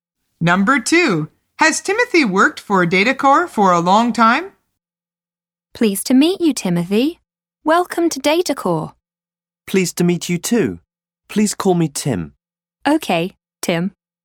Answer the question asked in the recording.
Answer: The answer is no. He is new to the company.